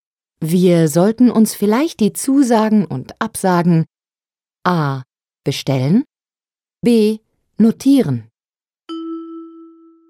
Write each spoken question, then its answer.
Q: Wir sollten uns vielleicht die Zusagen und Absagen A.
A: B. Wir sollten uns vielleicht die Zusagen und Absagen notieren.